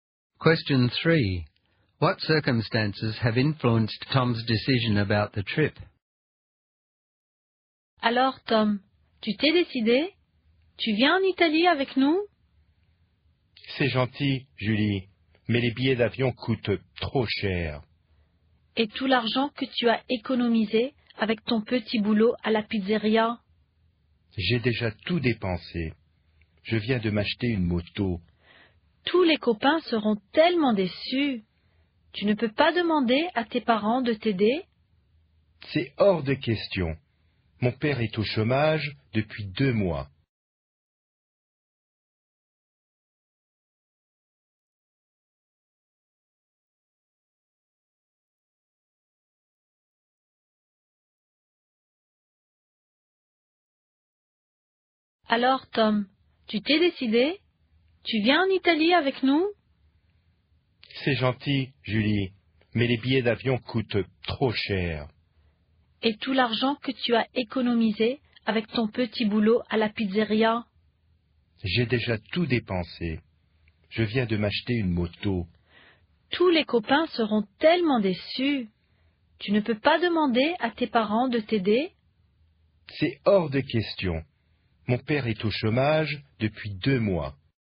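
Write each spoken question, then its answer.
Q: What circumstances have influenced Tom's decision about the trip?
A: Plane tickets are too expensive, he has spent his savings on a motorbike, and he can't ask his parents for help because his father has been unemployed for 2 months.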